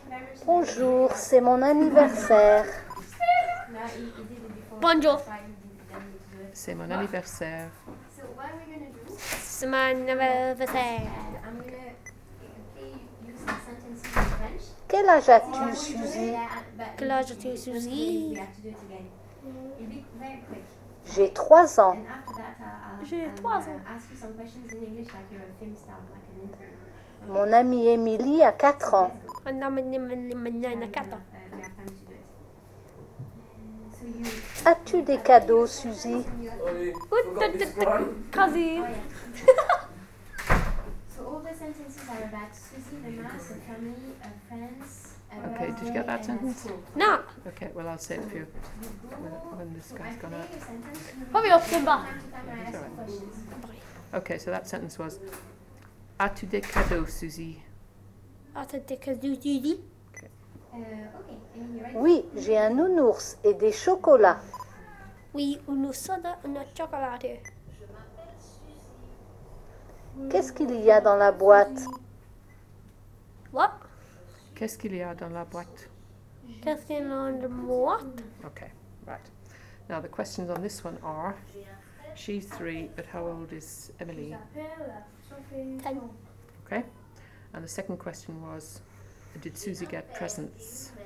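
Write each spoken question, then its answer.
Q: did Suzy get presents?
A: Yes, a teddy bear and chocolates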